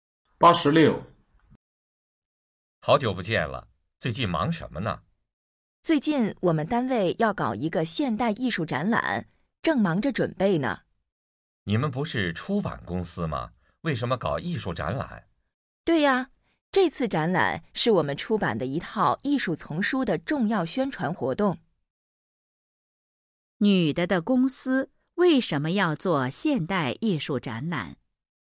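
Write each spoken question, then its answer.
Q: 女的的公司为什么要做现代艺术展览?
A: 宣传公司出版的艺术丛书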